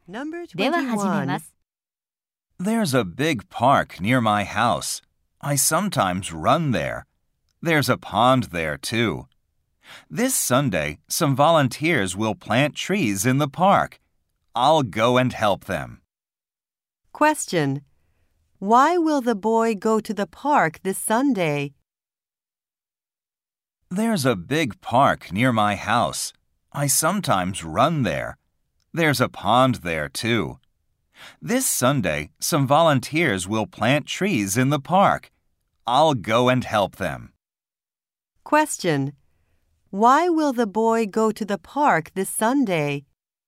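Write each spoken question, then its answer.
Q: Why will the boy go to the park this Sunday?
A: To help plant trees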